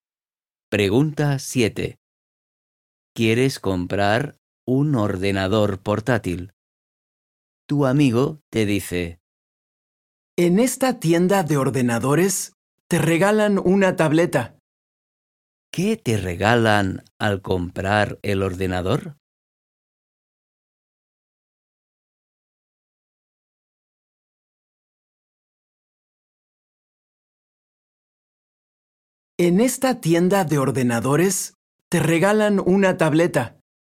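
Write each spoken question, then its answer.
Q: ¿Qué te regalan al comprar el ordenador?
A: una tableta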